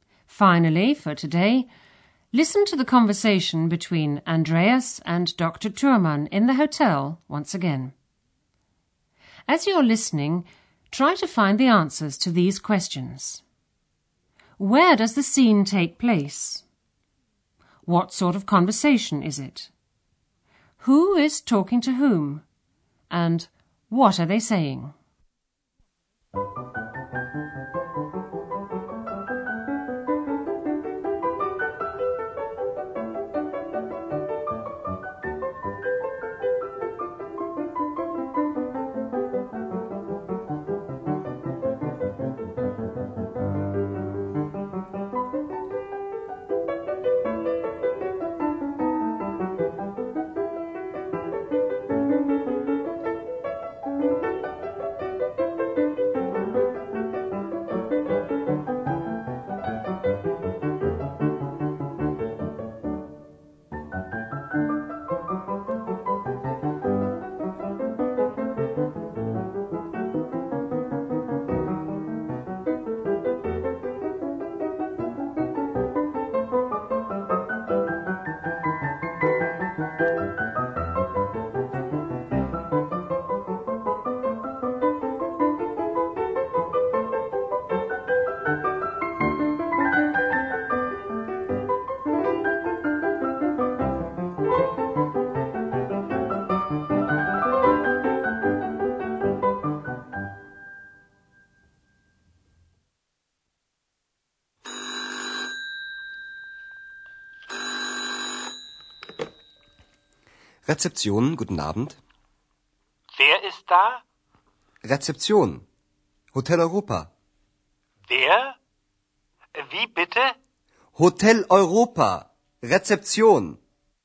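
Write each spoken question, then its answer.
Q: Where does the scene take place?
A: At the Hotel Europa reception

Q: Who is talking to whom?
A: Andreas and Dr. Thürmann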